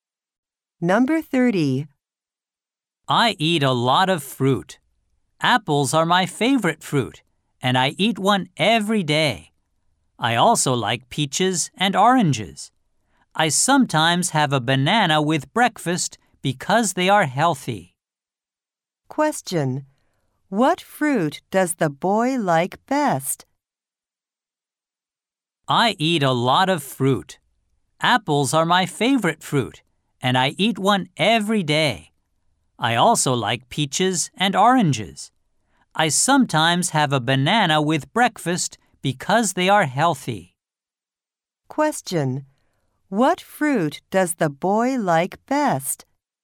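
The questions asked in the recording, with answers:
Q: What fruit does the boy like best?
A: Apples.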